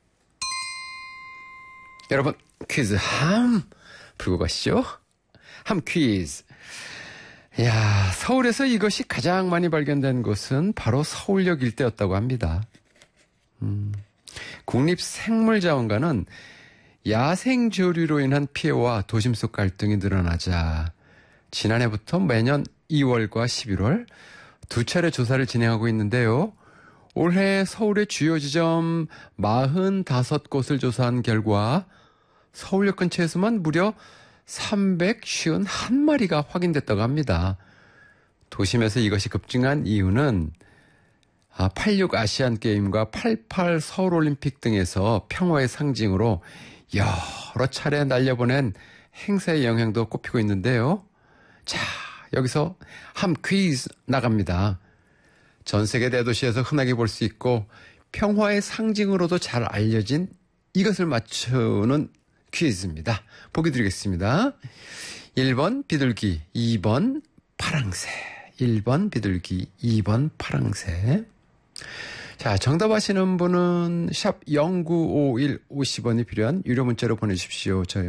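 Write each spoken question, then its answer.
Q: 전 세계 대도시에서 흔하게 볼 수 있고 평화의 상징으로도 잘 알려진 이것을 맞추는 퀴즈입니다.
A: 1번: 비둘기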